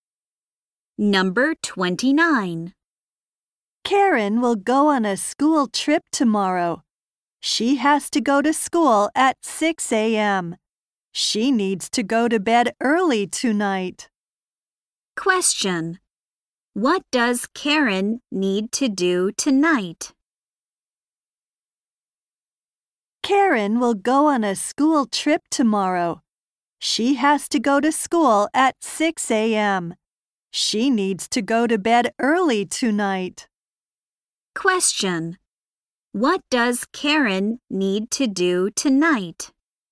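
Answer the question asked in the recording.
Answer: Go to bed early.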